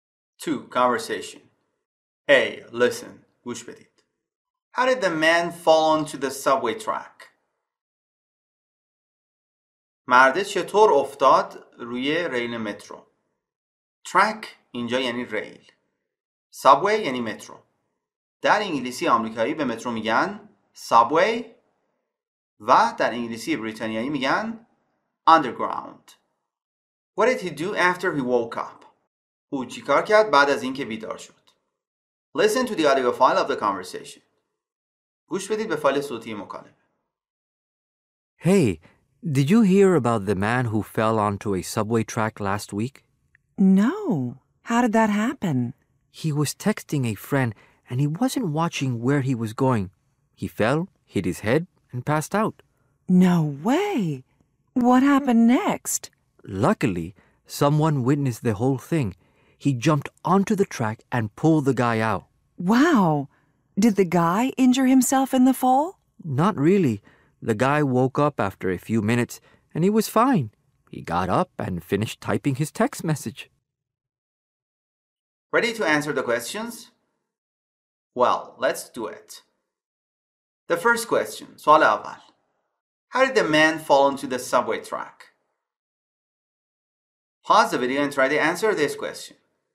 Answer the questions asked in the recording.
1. the man fell onto the subway track because he wasn't watching where he was going.
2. After he woke up, he finished typing his text message.